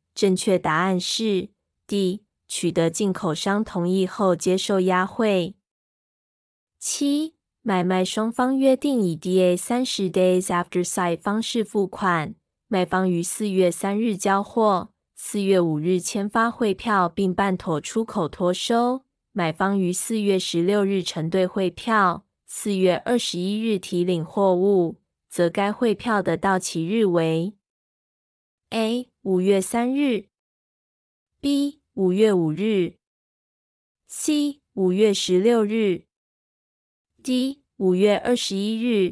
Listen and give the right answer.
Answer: 正确答案是 C.5月16日。